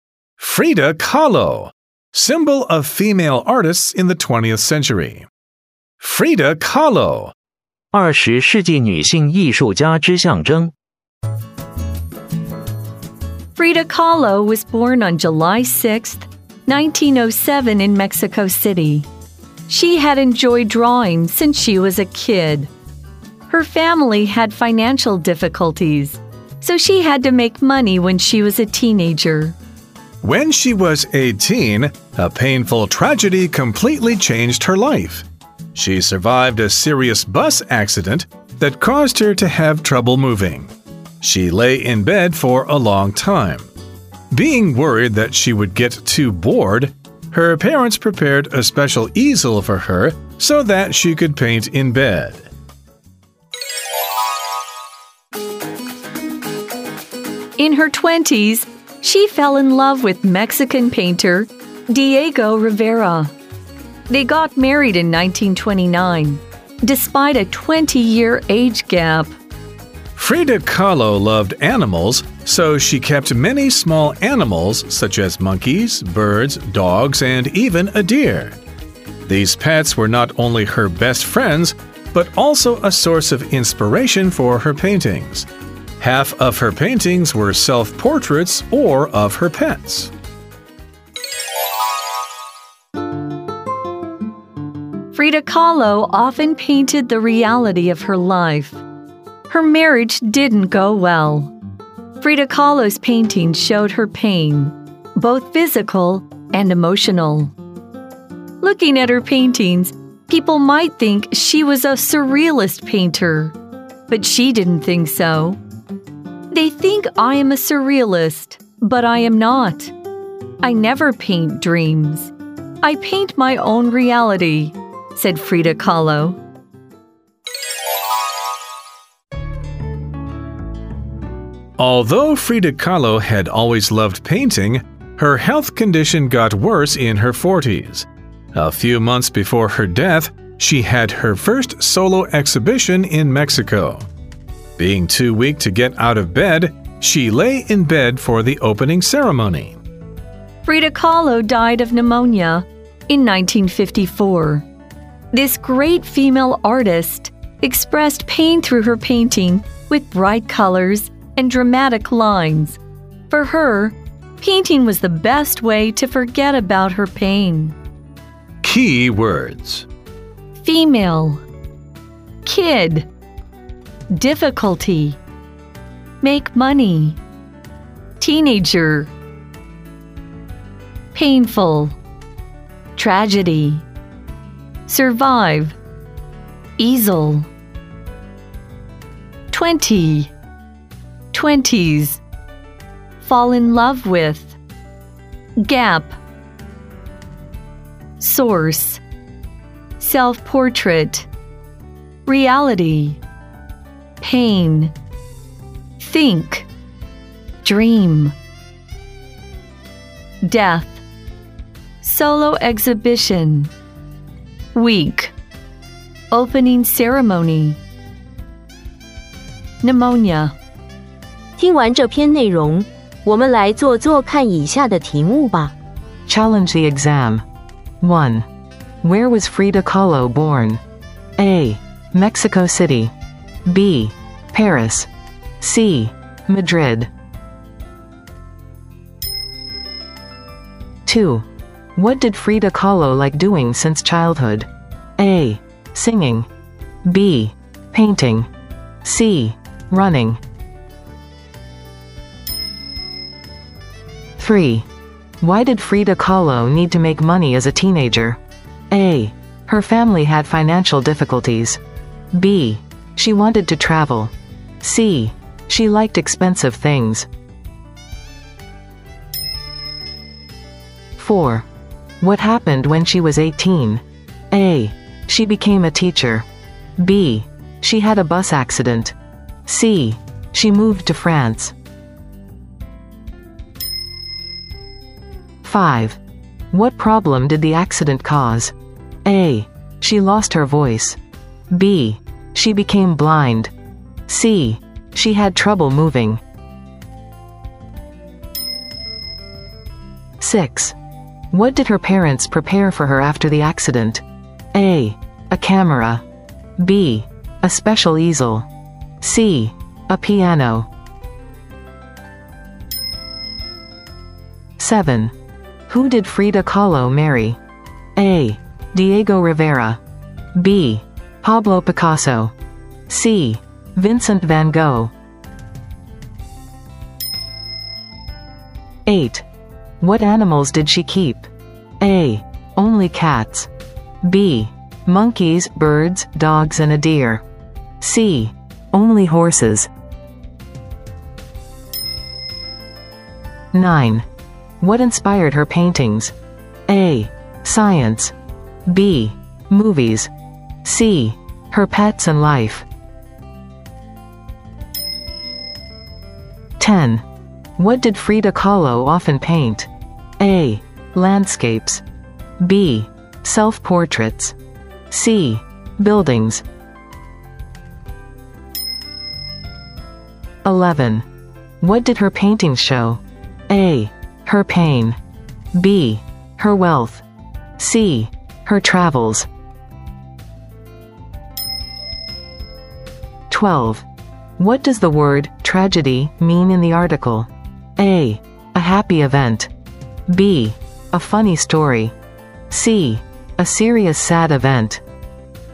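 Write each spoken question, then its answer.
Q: Where was Frida Kahlo born?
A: A: Mexico City

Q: What did Frida Kahlo like doing since childhood?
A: B: Painting

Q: Why did Frida Kahlo need to make money as a teenager?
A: A: Her family had financial difficulties

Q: What happened when she was 18?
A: B: She had a bus accident

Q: What problem did the accident cause?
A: C: She had trouble moving

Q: What did her parents prepare for her after the accident?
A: B: A special easel

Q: Who did Frida Kahlo marry?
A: A: Diego Rivera

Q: What animals did she keep?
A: B: Monkeys, birds, dogs, and a deer

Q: What inspired her paintings?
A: C: Her pets and life

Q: What did Frida Kahlo often paint?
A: B: Self-portraits

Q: What did her paintings show?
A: A: Her pain

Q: What does the word tragedy mean in the article?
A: C: A serious, sad event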